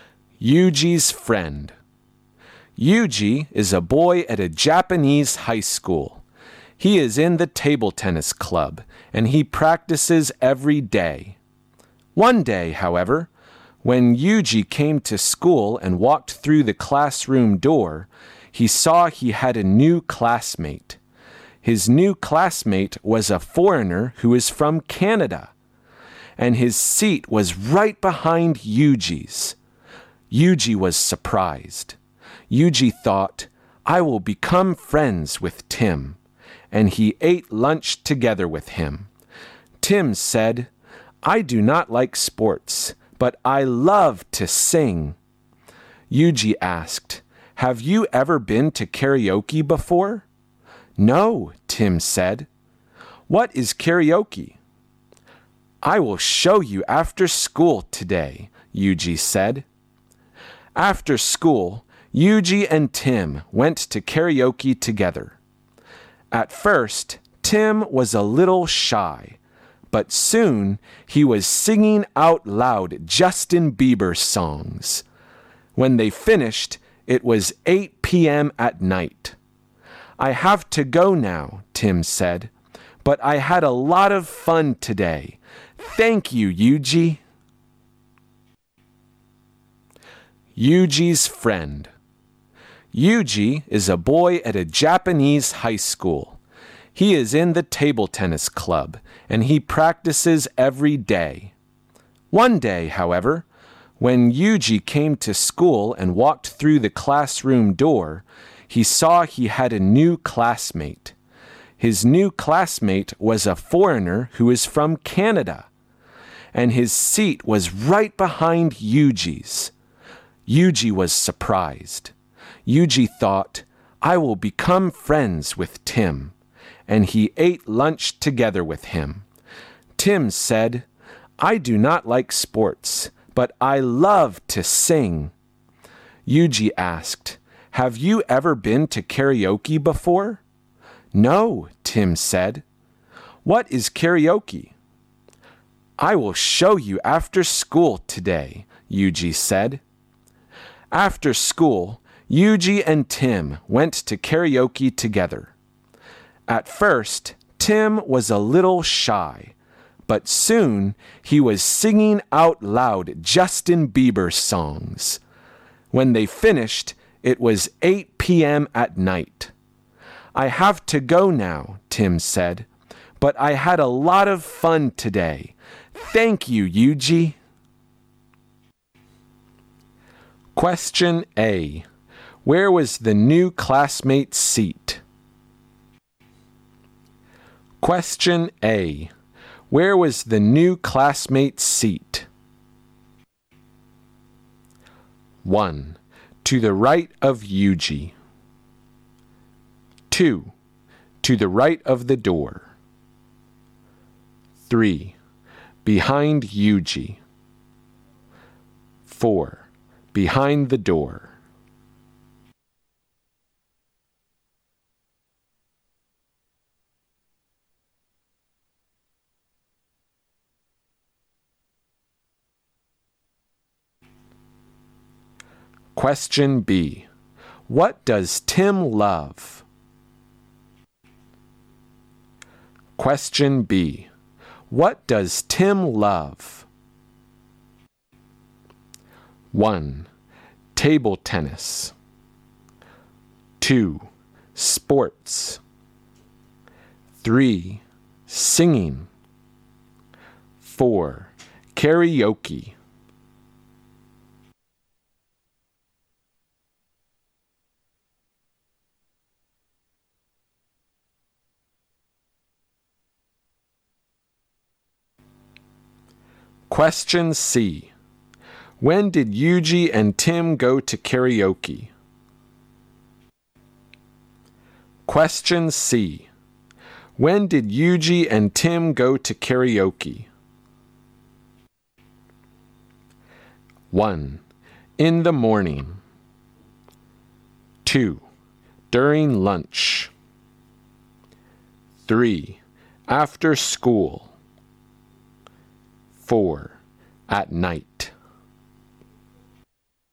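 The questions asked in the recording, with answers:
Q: Question A. Where was the new classmate's seat?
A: 3: Behind Yuji.

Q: Question B. What does Tim love?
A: 3: Singing.

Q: Question C. When did Yuji and Tim go to karaoke?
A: 3: After school.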